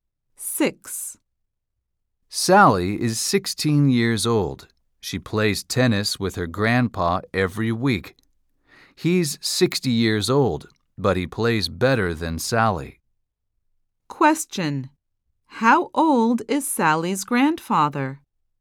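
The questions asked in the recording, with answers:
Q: How old is Sally's grandfather?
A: 60 years old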